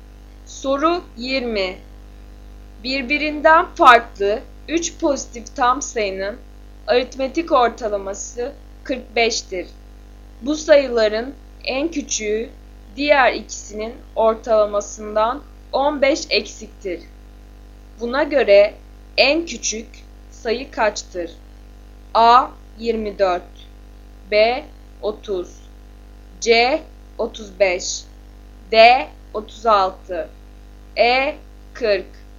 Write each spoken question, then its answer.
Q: Buna göre en küçük sayı kaçtır?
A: Doğru yanıt C 35.